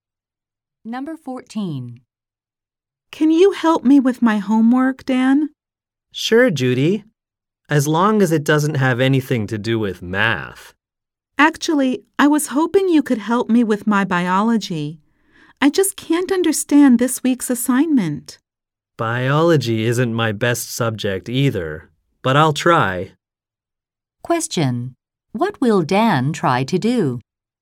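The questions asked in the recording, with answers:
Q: What will Dan try to do?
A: Help Judy with her biology homework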